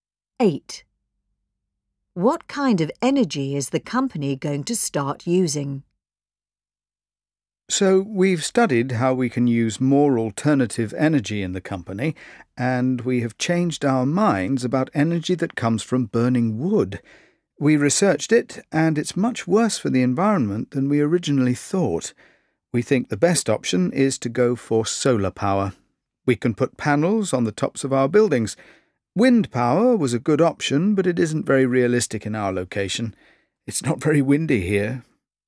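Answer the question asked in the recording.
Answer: Solar power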